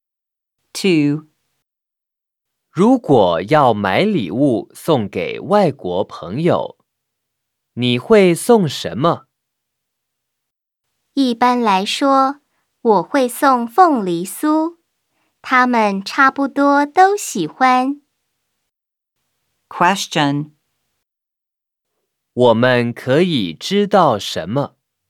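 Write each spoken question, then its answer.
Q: 我们可以知道什么?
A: 他一般会送凤梨酥给外国朋友。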